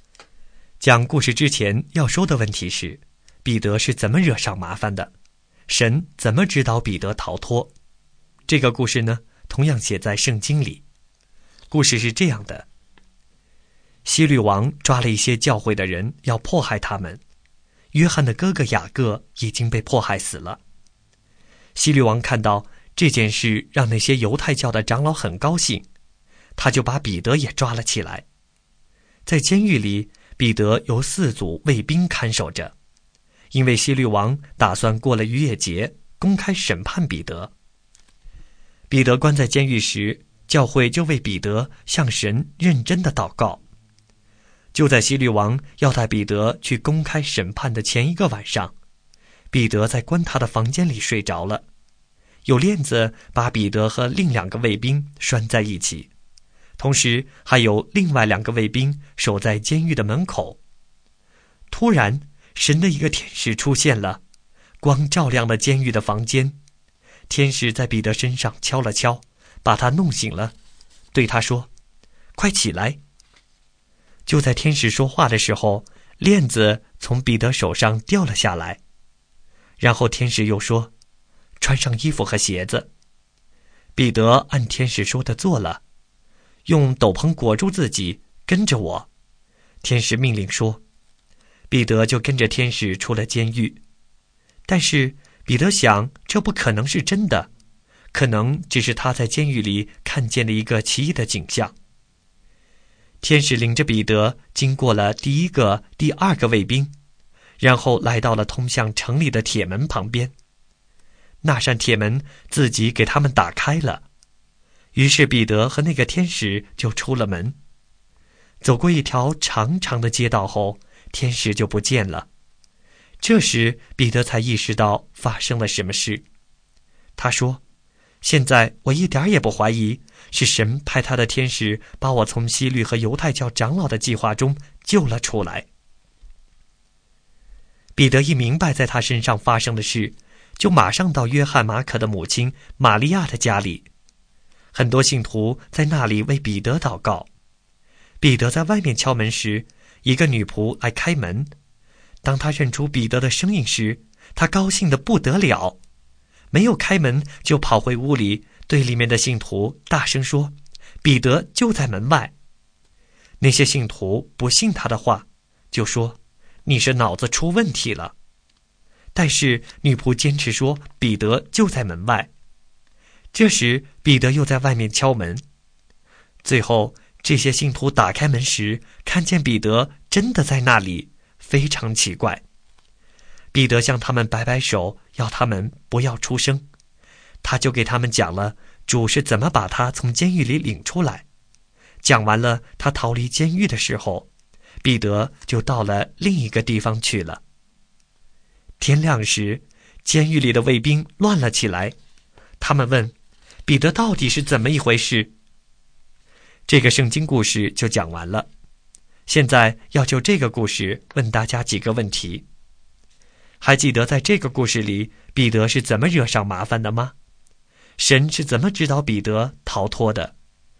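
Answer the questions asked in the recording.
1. 希律王迫害教会的人,看到犹太教长老高兴,就把彼得也抓进监狱,打算过了逾越节公开审判他
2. 神派天使进监狱叫醒彼得,链子掉下,天使领他经过卫兵,铁门自己打开,带他出了监狱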